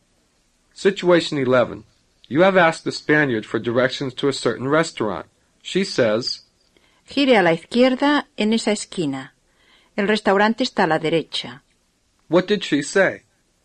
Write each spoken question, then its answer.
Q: What did she say?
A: She said, turn left at that corner. The restaurant is on the right.